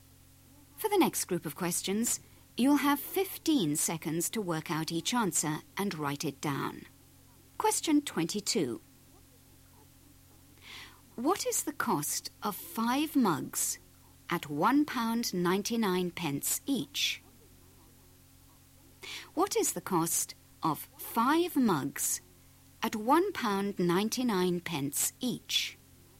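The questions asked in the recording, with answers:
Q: What is the cost of 5 mugs at £1.99 each?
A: £9.95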